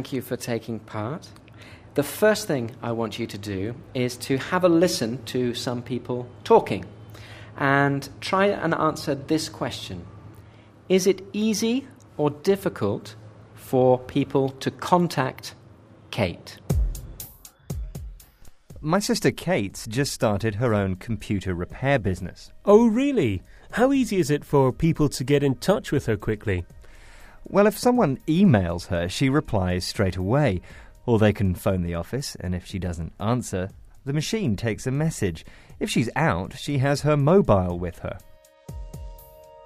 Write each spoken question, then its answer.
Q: Is it easy or difficult for people to contact Kate?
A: Okay, yes, it's easy for people to contact Kate.